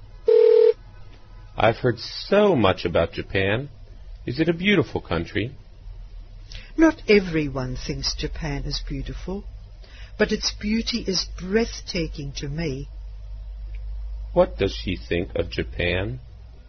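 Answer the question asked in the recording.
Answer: Its beauty is breathtaking to her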